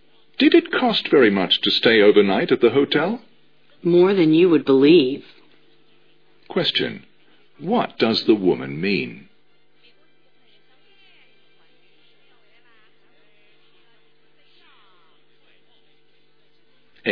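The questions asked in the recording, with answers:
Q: What does the woman mean?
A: The hotel was very expensive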